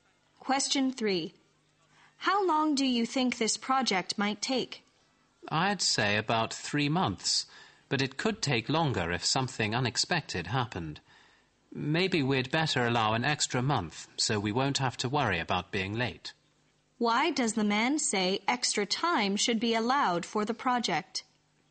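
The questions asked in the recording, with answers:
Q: Why does the man say extra time should be allowed for the project?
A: Something unexpected might happen, and they don't want to be late.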